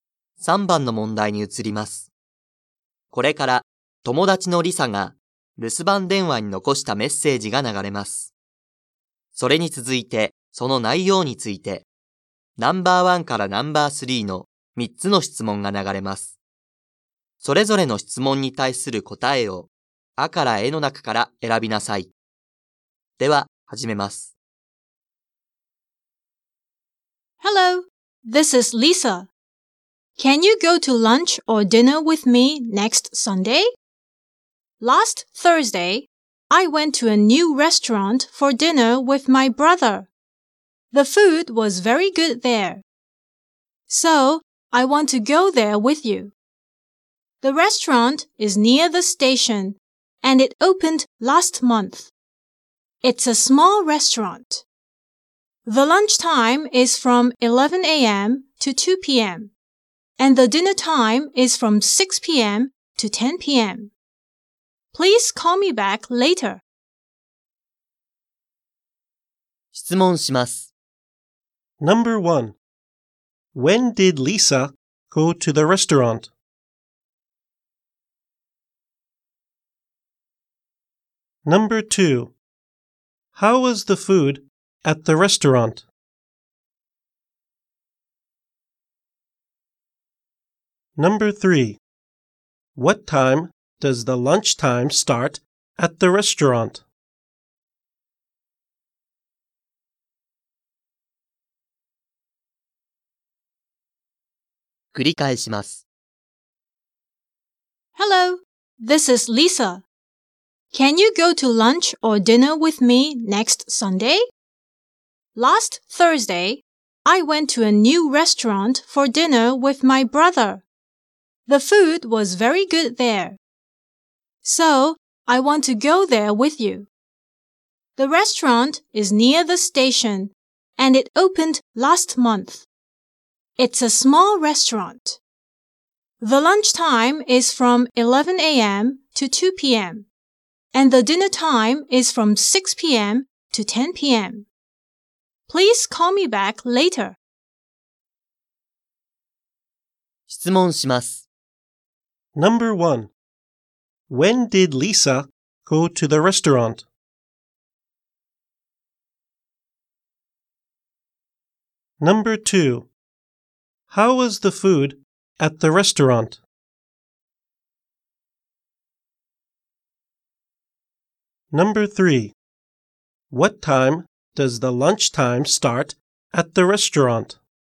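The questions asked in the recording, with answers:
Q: When did Lisa go to the restaurant?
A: Last Thursday.

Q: How was the food at the restaurant?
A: It was very good.

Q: What time does the lunch time start at the restaurant?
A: At 11 a.m.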